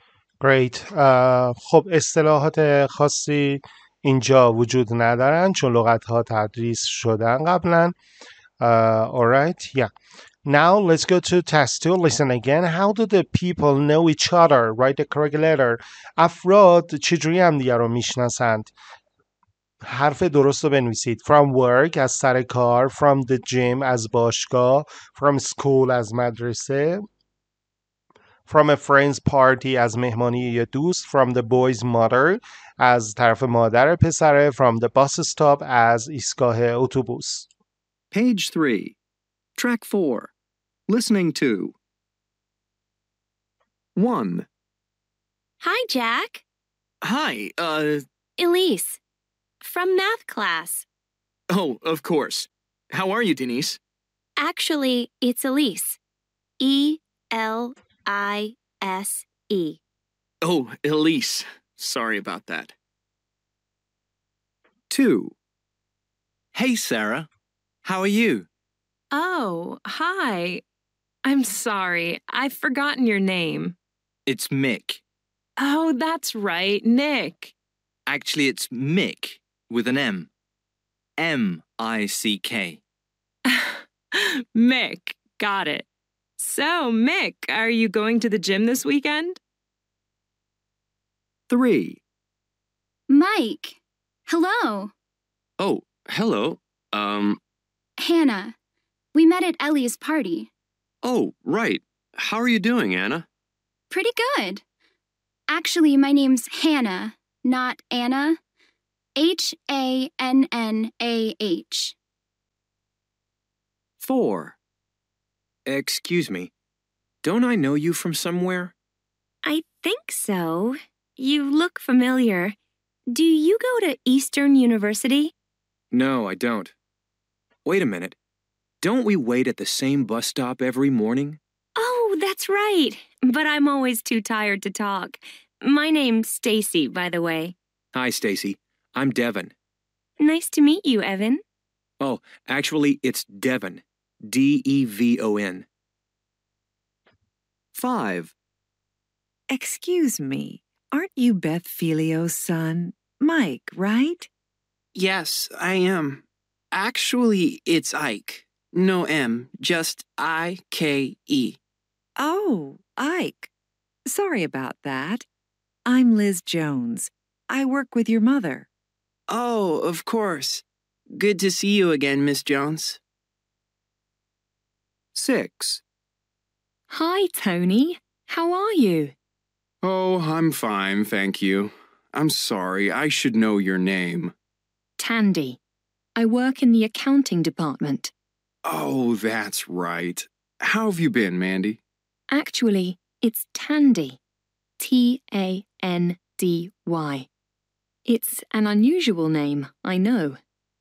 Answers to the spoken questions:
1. 1C
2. 2B
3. 3D
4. 4F
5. 5E
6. 6A